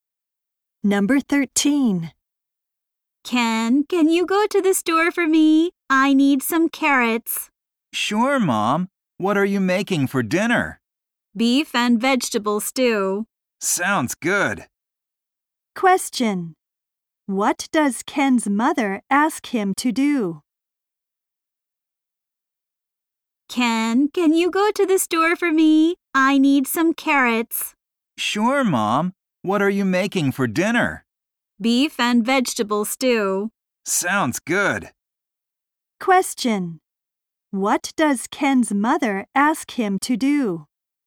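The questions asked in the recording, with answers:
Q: What does Ken's mother ask him to do?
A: Go to the store to buy carrots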